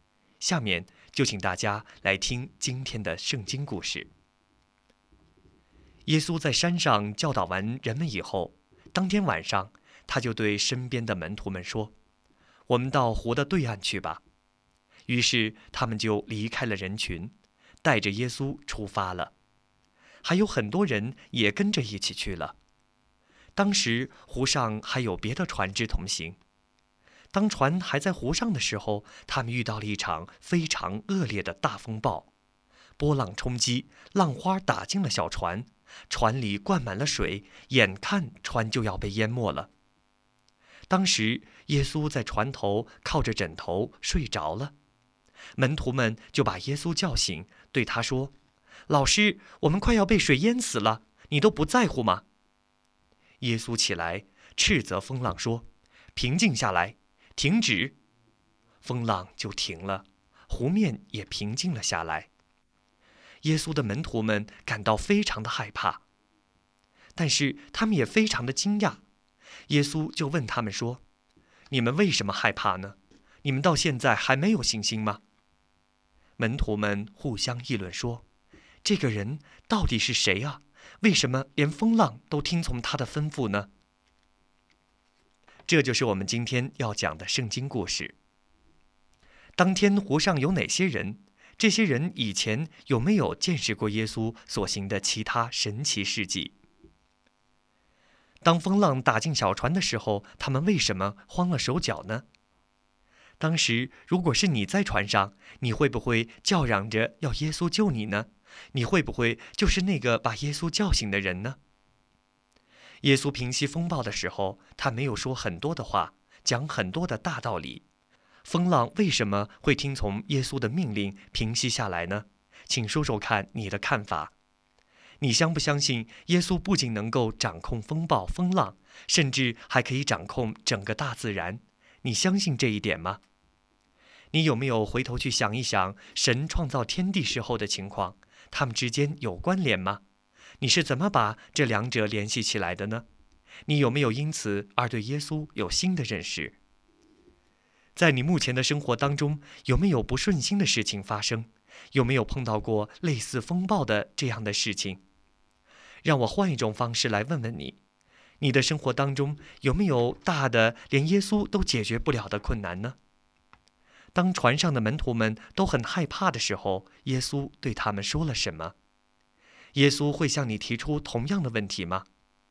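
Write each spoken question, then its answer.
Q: 当天湖上有哪些人?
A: 耶稣、他的门徒们,还有别的船上跟着同行的很多人

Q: 当风浪打进小船的时候,他们为什么慌了手脚呢?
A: 船里灌满了水,眼看船就要被淹没了,他们怕被淹死

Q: 当船上的门徒们都很害怕的时候,耶稣对他们说了什么?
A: 你们为什么害怕呢?你们到现在还没有信心吗?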